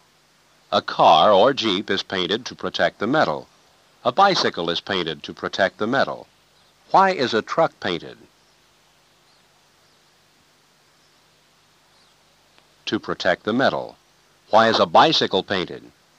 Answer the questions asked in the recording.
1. To protect the metal.
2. A bicycle is painted to protect the metal.